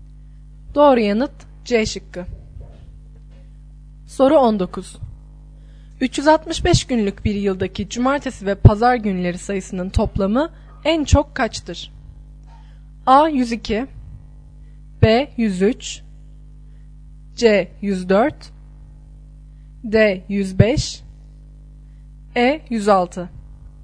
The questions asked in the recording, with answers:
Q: 365 günlük bir yıldaki cumartesi ve pazar günleri sayısının toplamı en çok kaçtır?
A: Doğru yanıt D şıkkı.